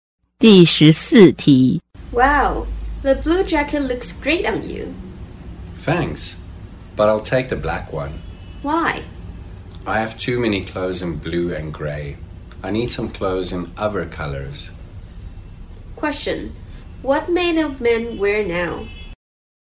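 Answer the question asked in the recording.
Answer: The black jacket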